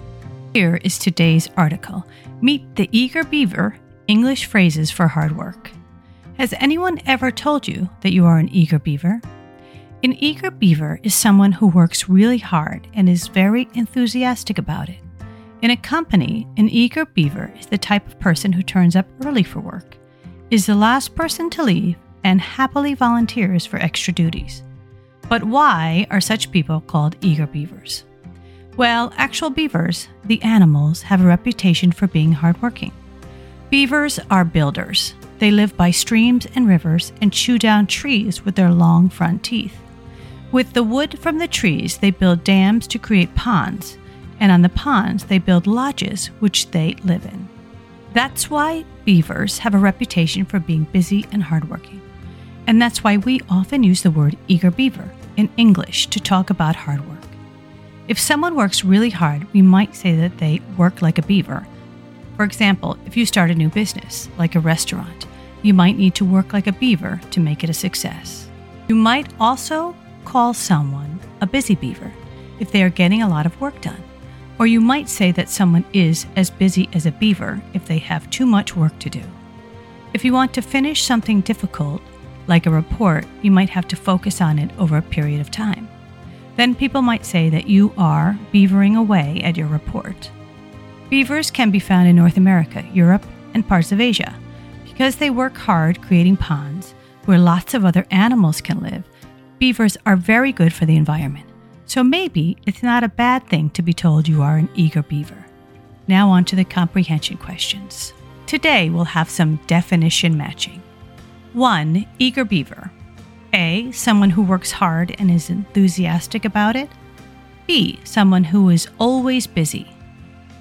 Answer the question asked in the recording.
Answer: Answer. Eager beaver is someone who works hard and is very enthusiastic about it.